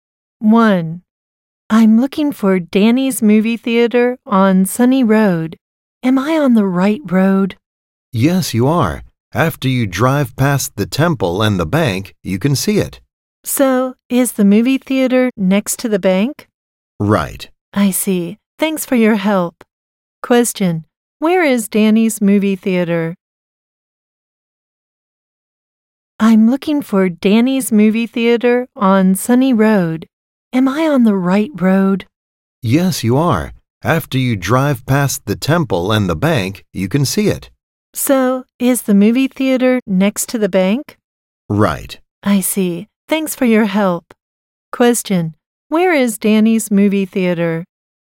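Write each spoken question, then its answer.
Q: Question, where is Danny's movie theater?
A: Next to the bank on Sunny Road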